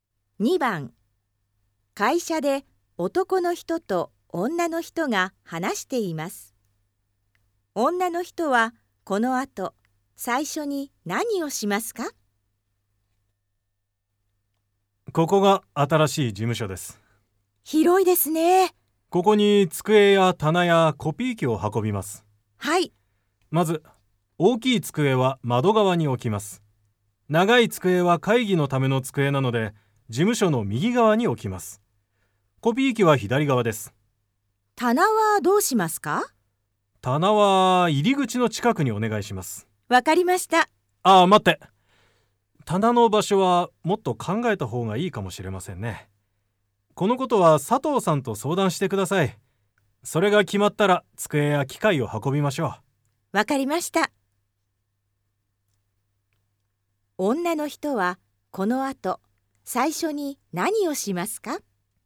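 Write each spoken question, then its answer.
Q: 女の人はこの後、最初に何をしますか?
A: 棚の場所について佐藤さんと相談する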